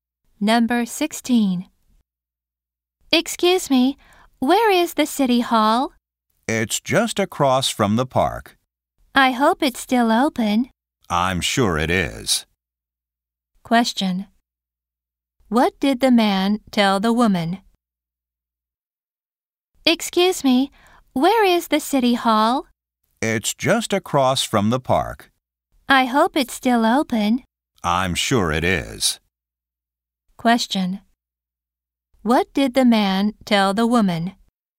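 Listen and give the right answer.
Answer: The city hall is across from the park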